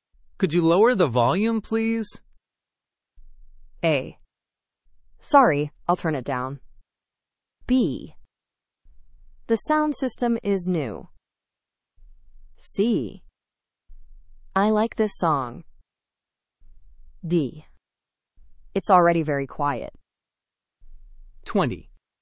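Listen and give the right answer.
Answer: A: Sorry, I'll turn it down.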